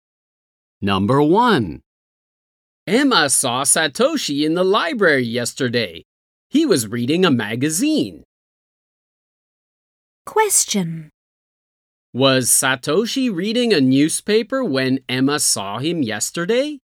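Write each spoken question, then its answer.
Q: Was Satoshi reading a newspaper when Emma saw him yesterday?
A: No, he wasn't. He was reading a magazine.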